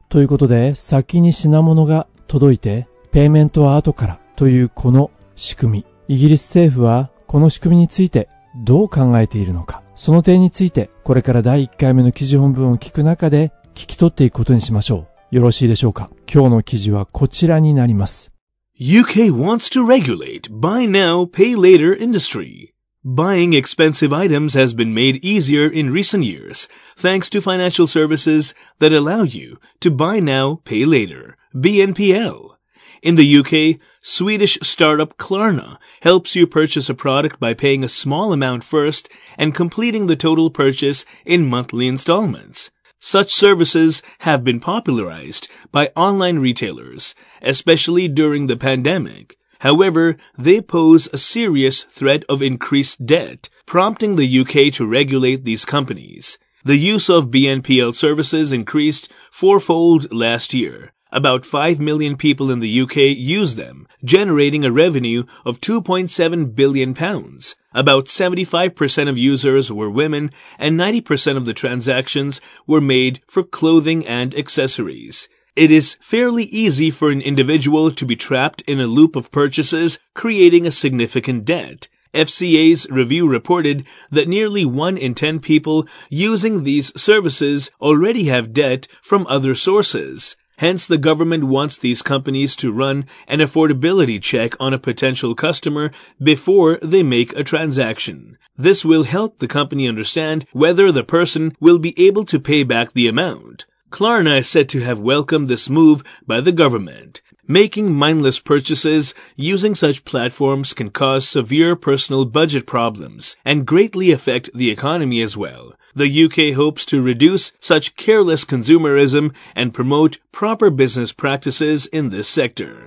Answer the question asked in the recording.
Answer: イギリス政府はこうしたサービスを提供する会社に対して事前に顧客のアフォーダビリティチェック、購入する余裕があるかどうか、余裕度チェックを行うように求めているんですね。